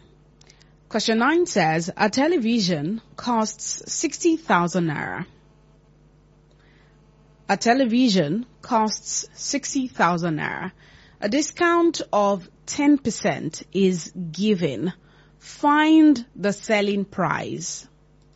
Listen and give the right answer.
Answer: That is correct. The discount is 6,000 naira.